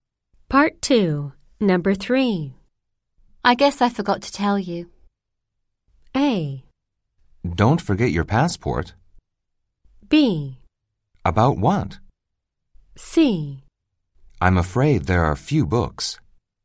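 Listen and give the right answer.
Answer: B: About what?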